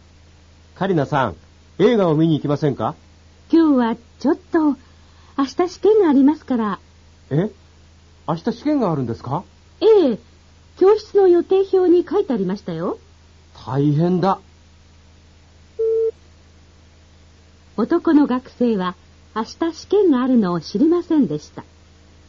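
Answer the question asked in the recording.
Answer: 正しい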